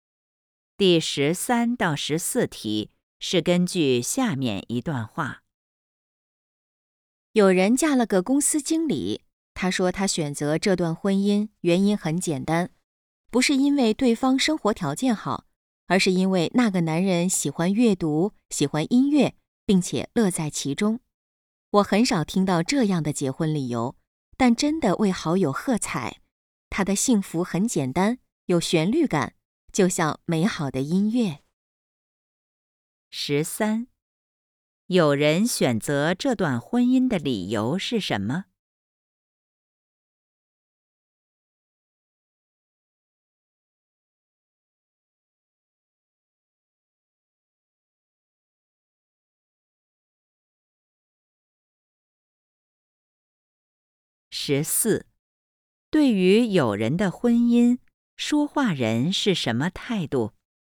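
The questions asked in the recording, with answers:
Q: 有人选择这段婚姻的理由是什么?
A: 对方喜欢阅读和音乐,并且乐在其中

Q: 对于有人的婚姻,说话人是什么态度?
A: 赞赏,为她高兴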